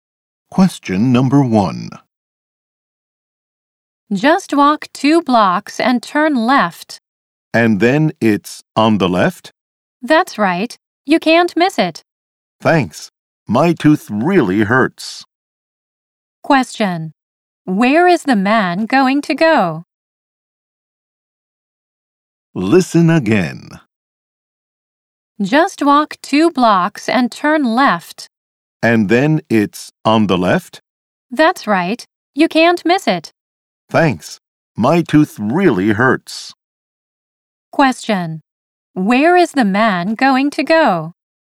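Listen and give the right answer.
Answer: To the dentist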